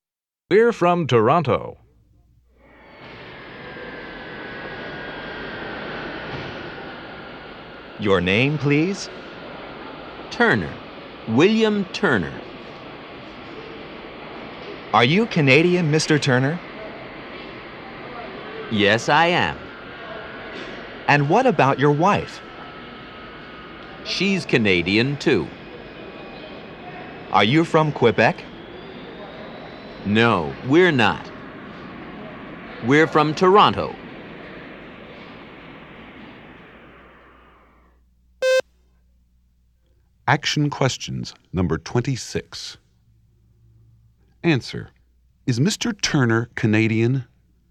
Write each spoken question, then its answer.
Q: Is Mr. Turner Canadian?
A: Yes, he is.